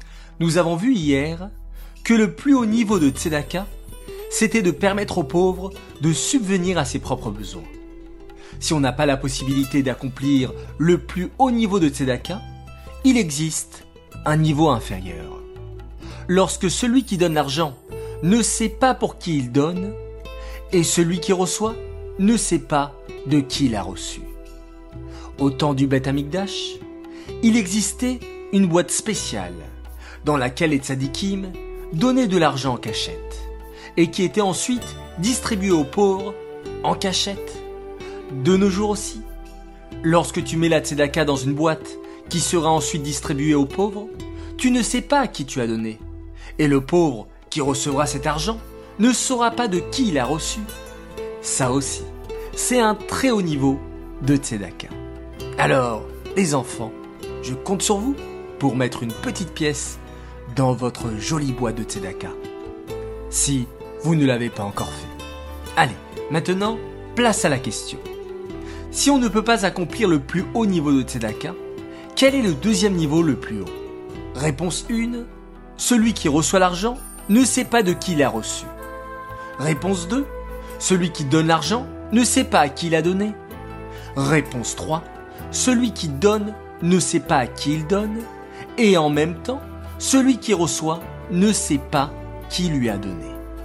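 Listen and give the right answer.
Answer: 3: Celui qui donne ne sait pas à qui il donne, et celui qui reçoit ne sait pas qui lui a donné.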